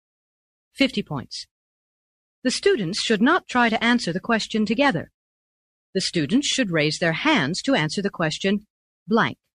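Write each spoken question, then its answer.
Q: The students should raise their hands to answer the question blank.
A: one at a time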